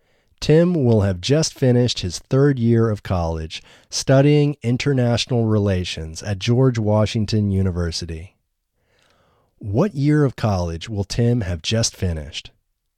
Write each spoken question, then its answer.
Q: What year of college will Tim have just finished?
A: Tim will have just finished his third year of college.